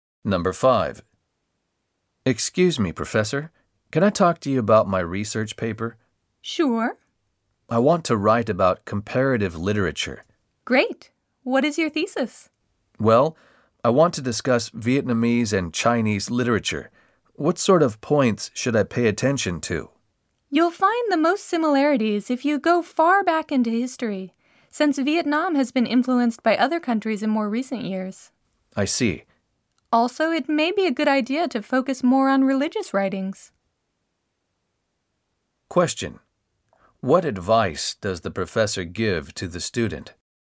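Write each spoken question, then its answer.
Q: What advice does the professor give to the student?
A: Look far back into history and focus more on religious writings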